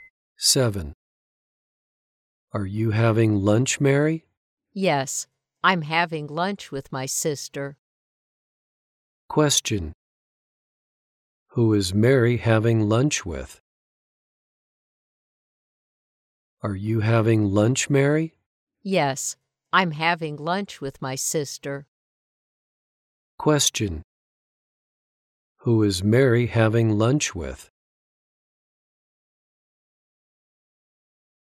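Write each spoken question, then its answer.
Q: Who is Mary having lunch with?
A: Her sister.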